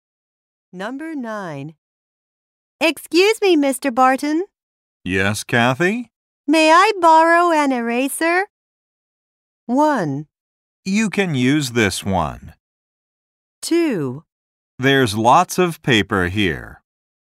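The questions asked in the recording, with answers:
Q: May I borrow an eraser?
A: 1: You can use this one.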